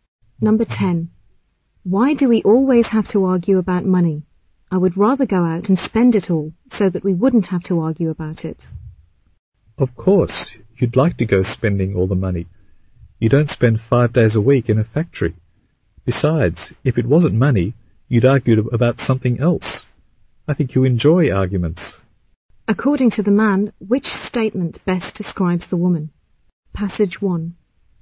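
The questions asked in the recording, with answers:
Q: According to the man, which statement best describes the woman?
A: She enjoys arguments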